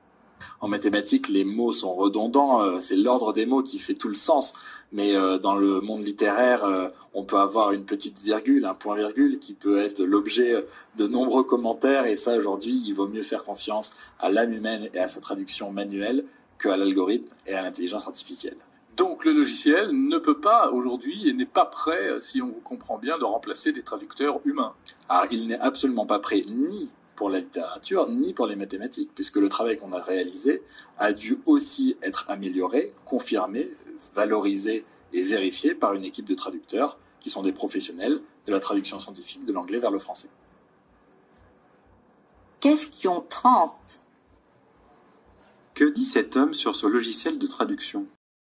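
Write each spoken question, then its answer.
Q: Que dit cet homme sur ce logiciel de traduction?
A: Il n'est pas prêt à remplacer les traducteurs humains, ni pour la littérature ni pour les mathématiques : son travail a dû être vérifié par des traducteurs professionnels.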